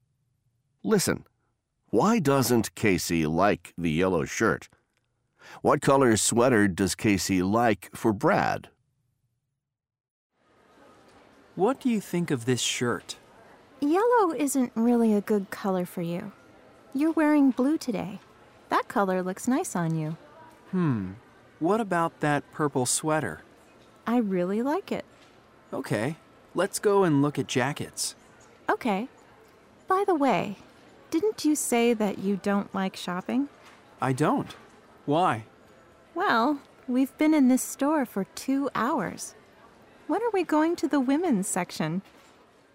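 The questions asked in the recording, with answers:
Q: Why doesn't Casey like the yellow shirt?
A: Yellow isn't really a good color for Brad.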